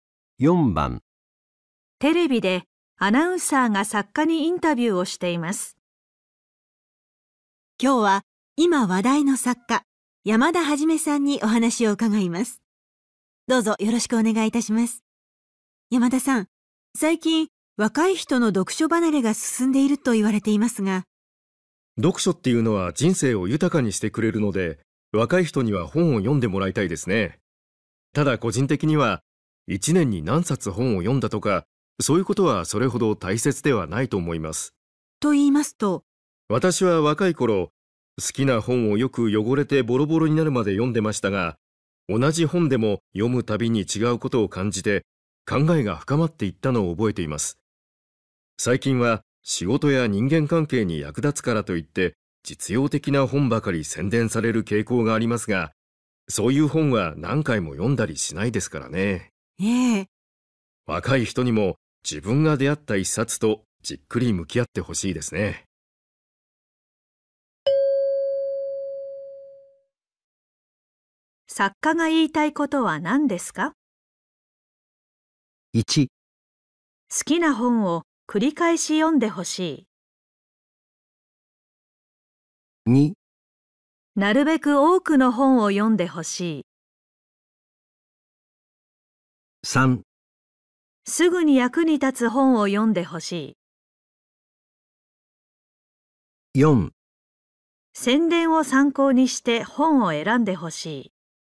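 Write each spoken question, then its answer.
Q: 作家が言いたいことは何ですか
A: 1: 好きな本を繰り返し読んでほしい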